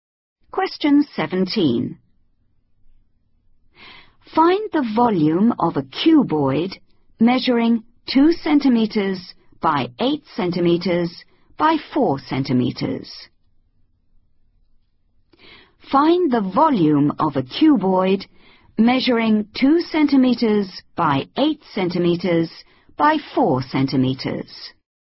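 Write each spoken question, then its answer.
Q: Find the volume of a cuboid measuring 2 centimeters by 8 centimeters by 4 centimeters.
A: 64 cm3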